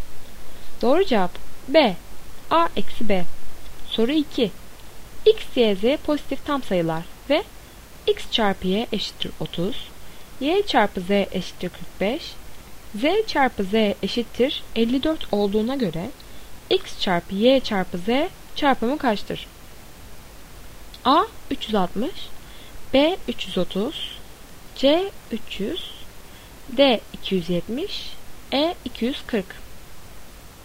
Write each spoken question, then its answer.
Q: X, Y, Z pozitif tam sayılar ve X çarpı Y eşittir 30, Y çarpı Z eşittir 45, Z çarpı Z eşittir 54 olduğuna göre X çarpı Y çarpı Z çarpımı kaçtır?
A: Doğru cevap D 270.